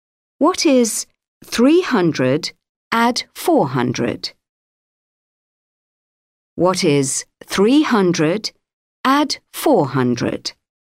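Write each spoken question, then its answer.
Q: What is 300 add 400?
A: 700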